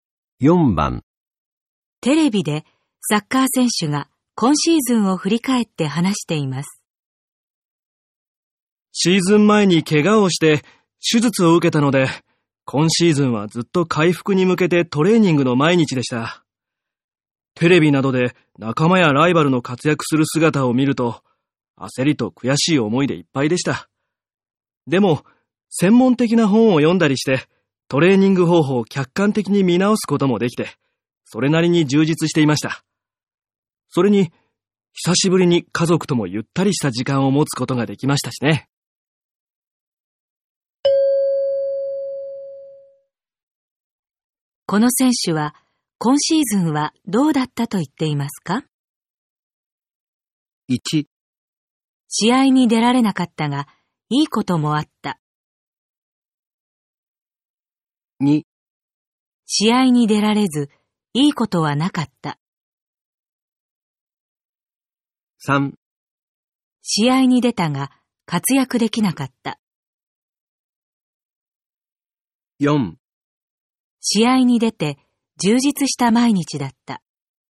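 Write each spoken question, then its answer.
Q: この選手は今シーズンはどうだったと言っていますか?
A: 1: 試合に出られなかったがいいこともあった。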